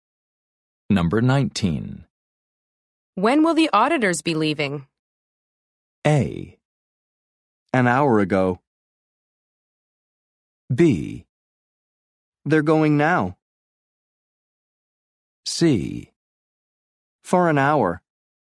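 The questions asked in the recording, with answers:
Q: When will the auditors be leaving?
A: B: They're going now.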